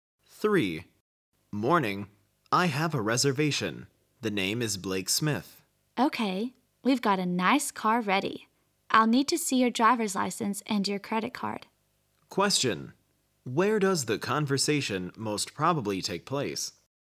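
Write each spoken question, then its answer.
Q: Where does the conversation most probably take place?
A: At a car rental office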